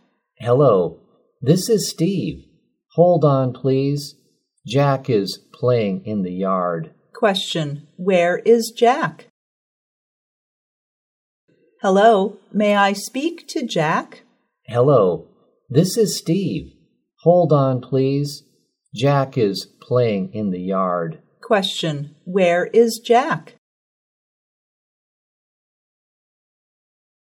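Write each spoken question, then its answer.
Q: where is Jack?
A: In the yard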